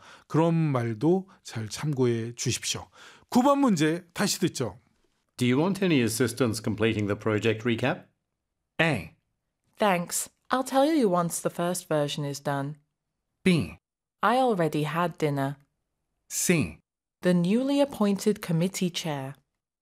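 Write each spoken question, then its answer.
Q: Do you want any assistance completing the project recap?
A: A: Thanks. I'll tell you once the first version is done.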